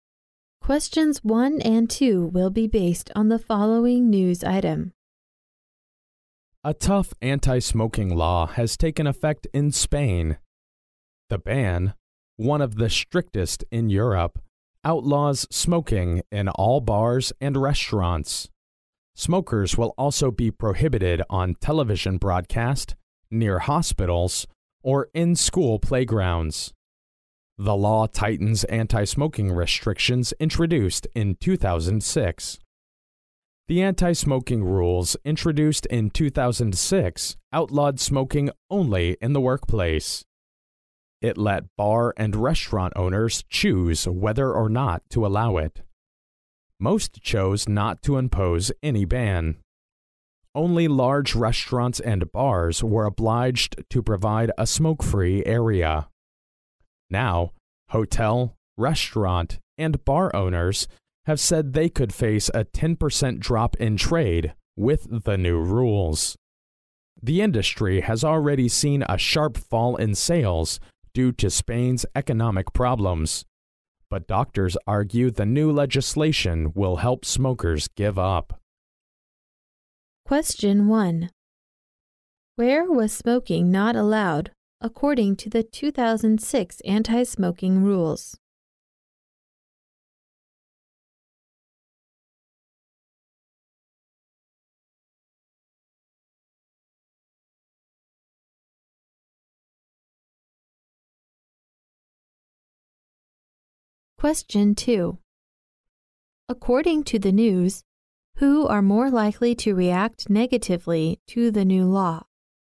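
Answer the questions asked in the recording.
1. In the workplace
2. Hotel, restaurant, and bar owners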